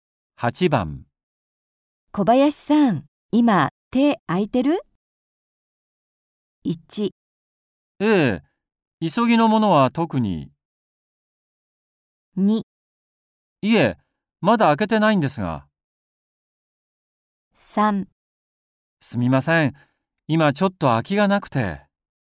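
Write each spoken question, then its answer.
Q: 小林さん、今手空いてる?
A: 1: ええ、急ぎのものは特に。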